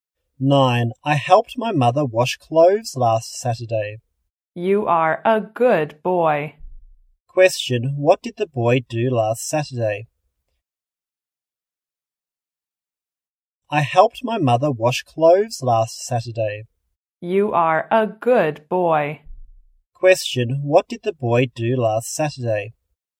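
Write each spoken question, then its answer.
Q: what did the boy do last Saturday?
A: He helped his mother wash clothes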